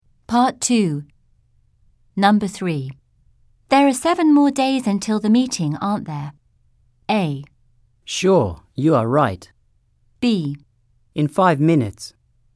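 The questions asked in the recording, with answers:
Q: There are 7 more days until the meeting, aren't there?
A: A: Sure, you are right.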